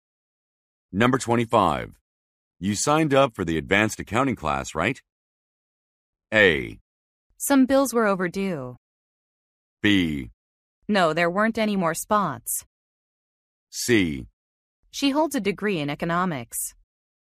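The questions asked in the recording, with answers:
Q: You signed up for the advanced accounting class, right?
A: B: No, there weren't any more spots.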